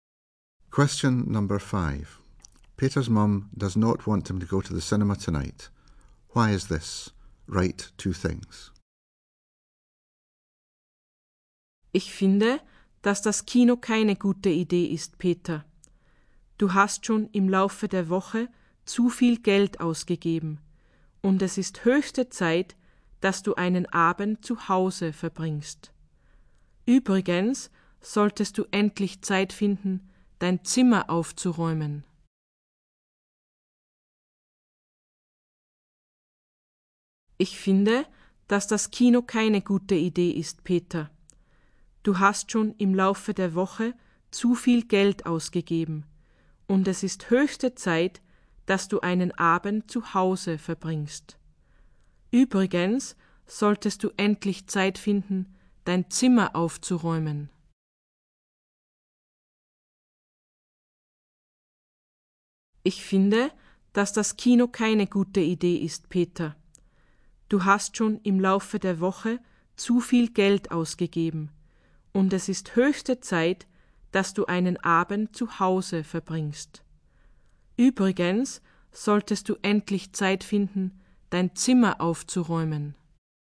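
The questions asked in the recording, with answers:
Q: Why is this? Write two things.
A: He has spent too much money this week and should spend an evening at home; he should tidy his room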